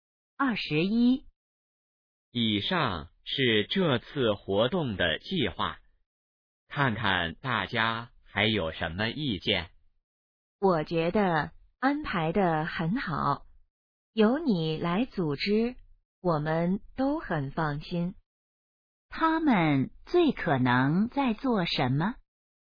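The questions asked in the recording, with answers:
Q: 他们最可能在做什么?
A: 讨论活动计划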